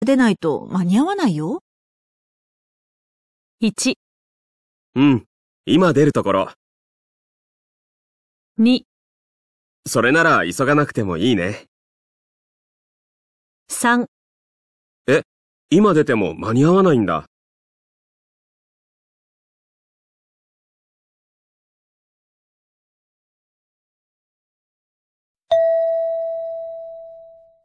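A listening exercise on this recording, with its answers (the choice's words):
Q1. 女:3時の新幹線に乗るなら、今すぐ会社出ないと間に合わないよ。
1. うん。今出るところ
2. それなら急がなくてもいいね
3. え?今出ても間に合わないんだ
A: うん。今出るところ

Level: 【N2 第2回】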